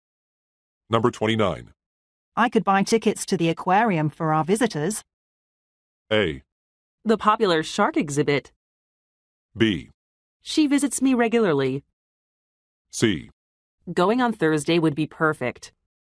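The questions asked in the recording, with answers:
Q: I could buy tickets to the aquarium for our visitors.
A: C: Going on Thursday would be perfect.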